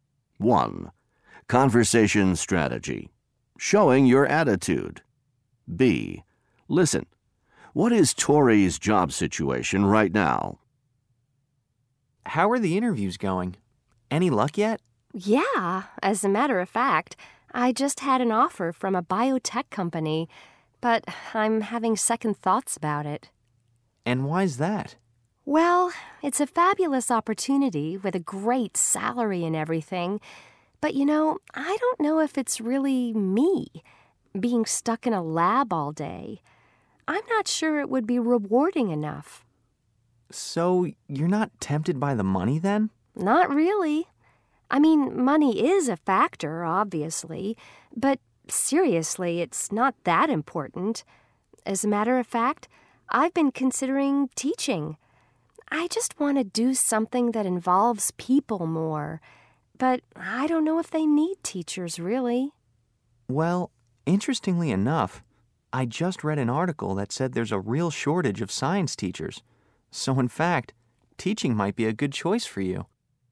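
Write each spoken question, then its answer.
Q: What is Tori's job situation right now?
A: She has an offer from a biotech company but is having second thoughts and is considering teaching.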